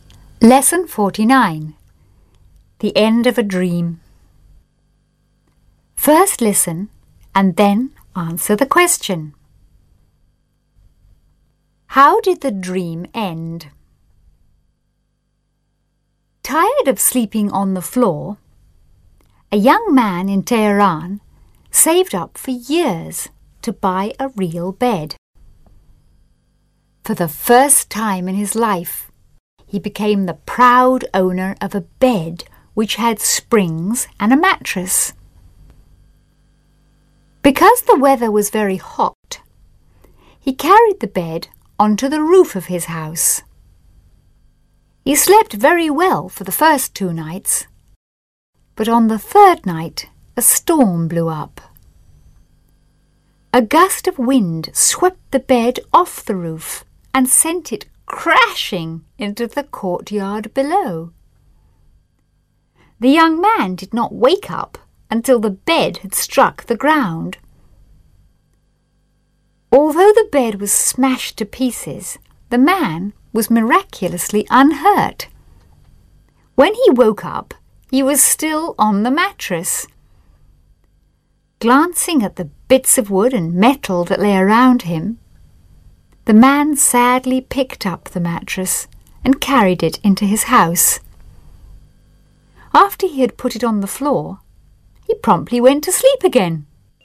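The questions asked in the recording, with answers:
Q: How did the dream end?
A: The bed was blown off the roof and smashed, so he went back to sleeping on the mattress on the floor.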